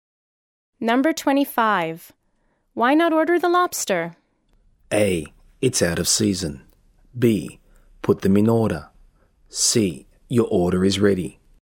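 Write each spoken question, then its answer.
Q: Why not order the lobster?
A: A: It's out of season.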